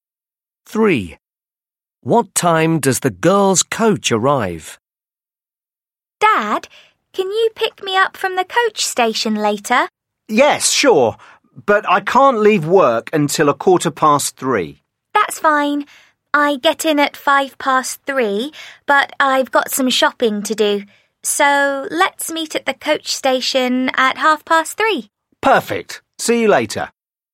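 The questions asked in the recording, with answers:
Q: What time does the girls' coach arrive?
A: 3:05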